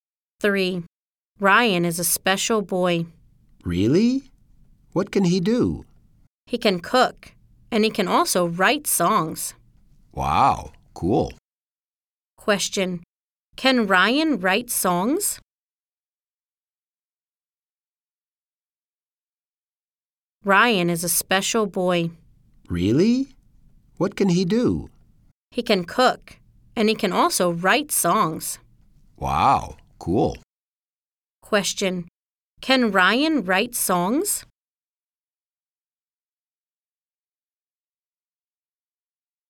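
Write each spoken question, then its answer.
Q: Can Ryan write songs?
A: Yes, he can.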